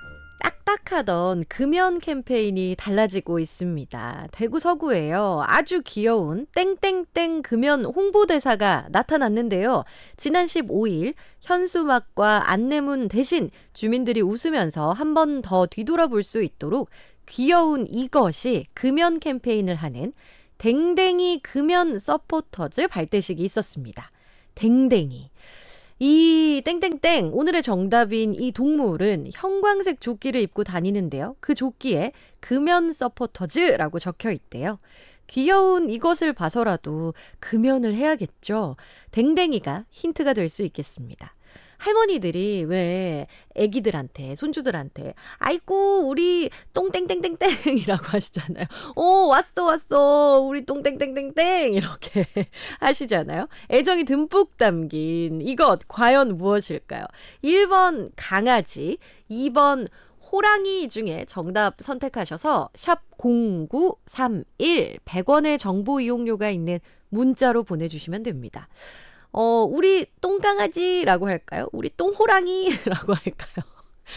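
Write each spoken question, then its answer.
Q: 애정이 듬뿍 담긴 이것 과연 무엇일까요?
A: 1번: 강아지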